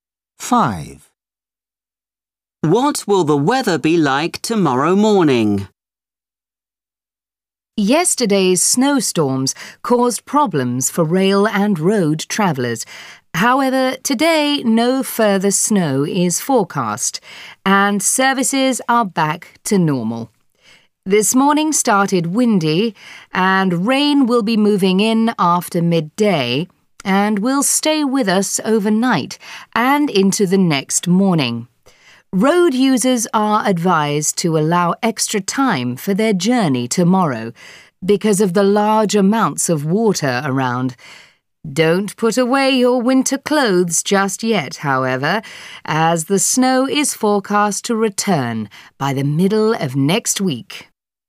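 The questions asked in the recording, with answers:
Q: What will the weather be like tomorrow morning?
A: rainy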